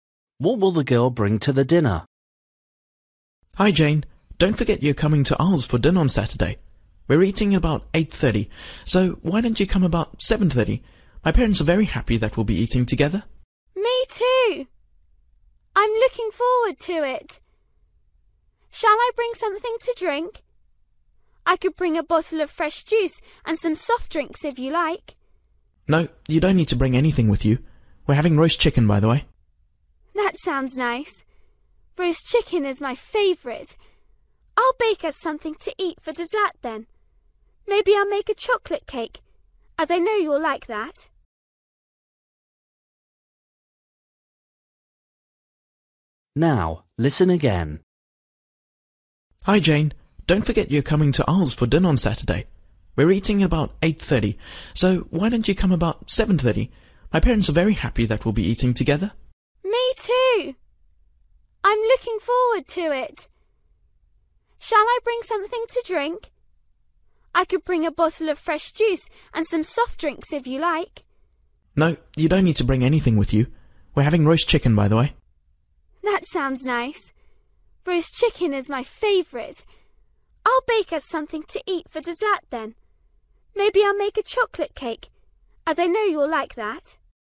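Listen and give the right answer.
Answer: a chocolate cake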